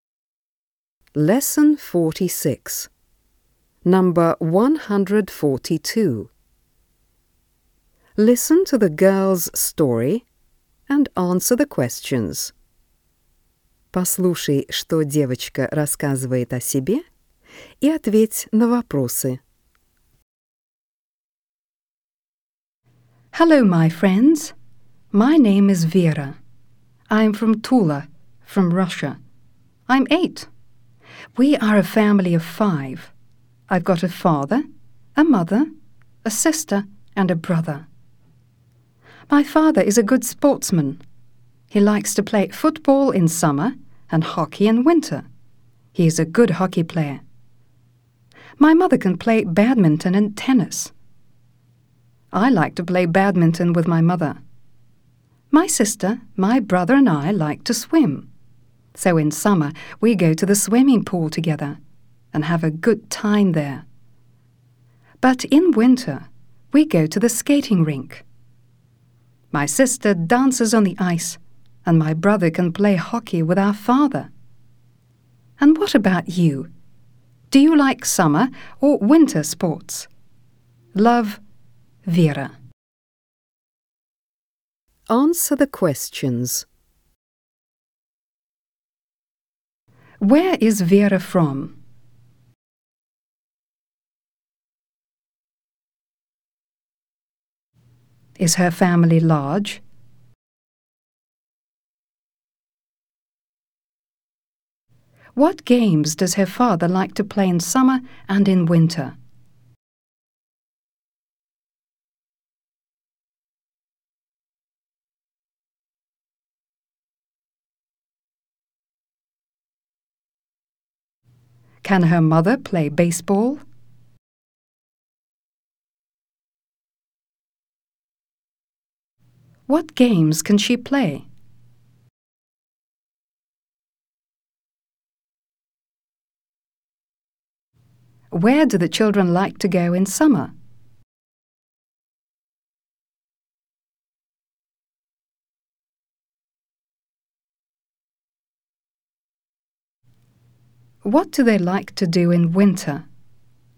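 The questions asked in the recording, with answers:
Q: Where is Vera from?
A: From Tula, Russia

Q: Is her family large?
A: Yes, a family of five

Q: What games does her father like to play in summer and in winter?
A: Football in summer and hockey in winter

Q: Can her mother play baseball?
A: No

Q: What games can she play?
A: Badminton and tennis

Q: Where do the children like to go in summer?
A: To the swimming pool

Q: What do they like to do in winter?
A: Go to the skating rink; the sister dances on the ice and the brother plays hockey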